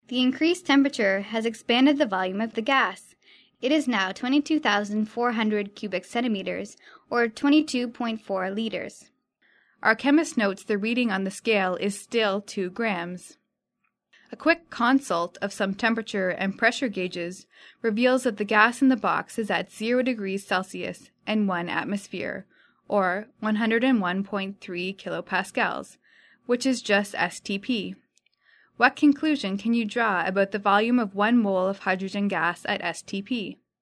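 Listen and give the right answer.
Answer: It is 22.4 liters (22,400 cubic centimeters)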